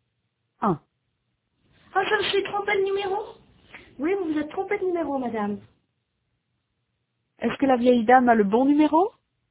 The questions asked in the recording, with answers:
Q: Est-ce que la vieille dame a le bon numéro?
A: Non, elle s'est trompée de numéro.